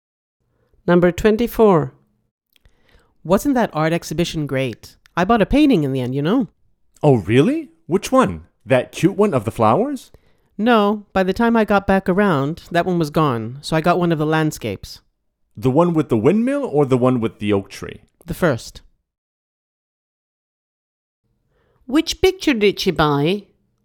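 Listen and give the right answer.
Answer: The landscape with the windmill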